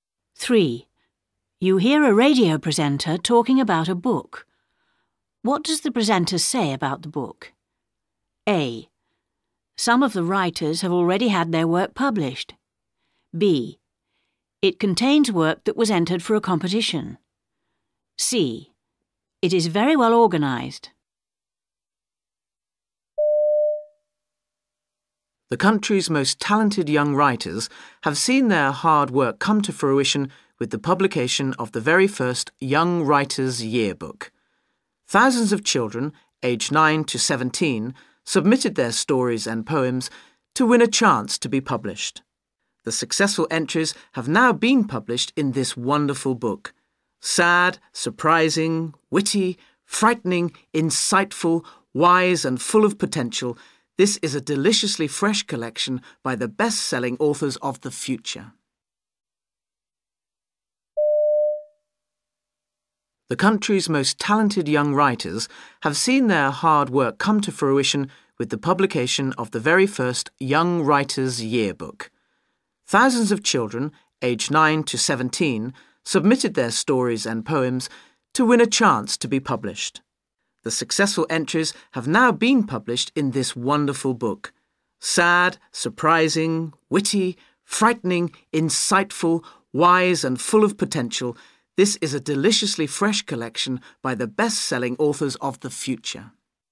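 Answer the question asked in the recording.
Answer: B: It contains work that was entered for a competition.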